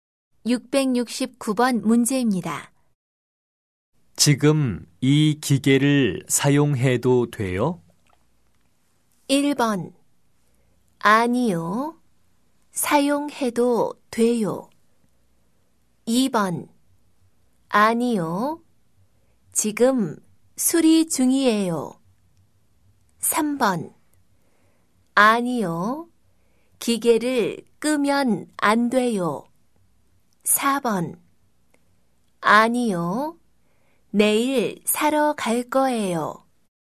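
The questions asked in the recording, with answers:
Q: 지금 이 기계를 사용해도 돼요?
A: 2: 아니요. 지금 수리 중이에요.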